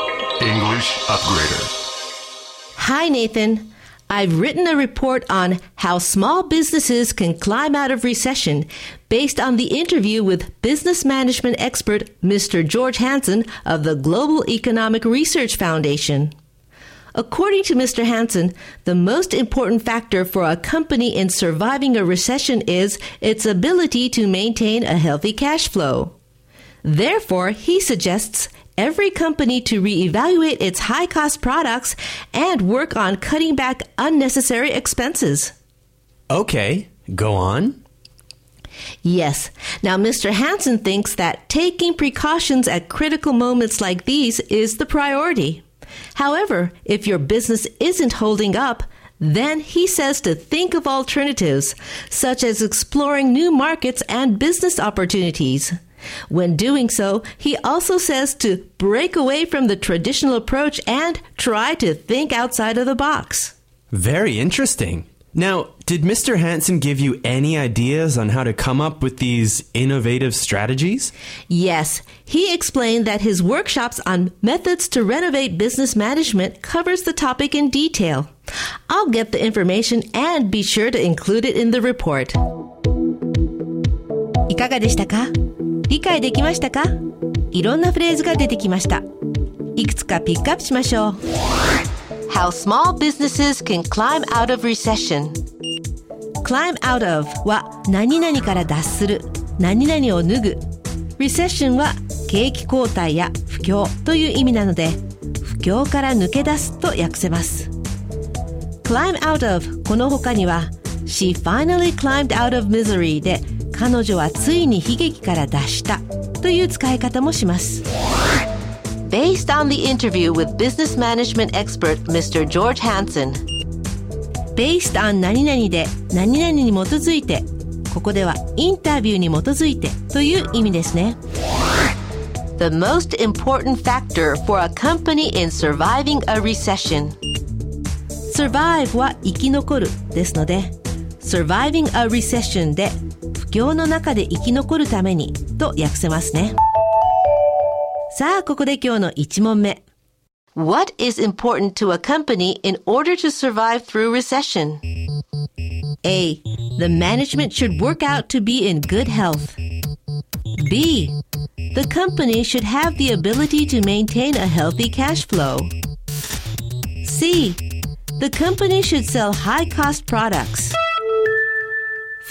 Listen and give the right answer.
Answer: 正解は B The company should have the ability to maintain a healthy cash flow.